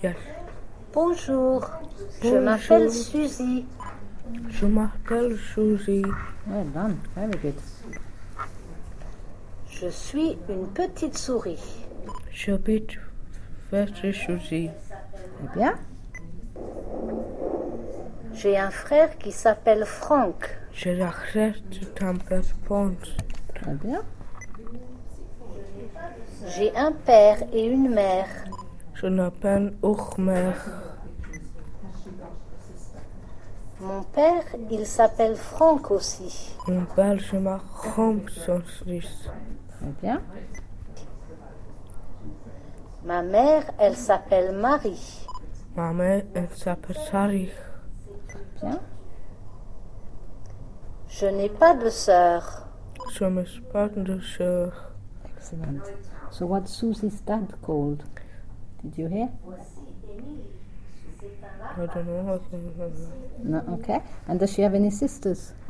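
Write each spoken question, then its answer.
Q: So what Susie's dad called?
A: Franck

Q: And does she have any sisters?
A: No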